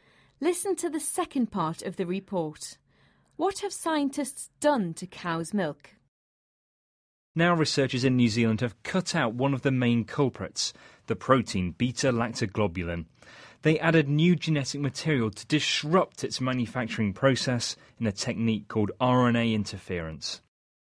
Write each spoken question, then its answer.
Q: What have scientists done to cow's milk?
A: Scientists identified a protein in cow's milk which causes allergic reactions.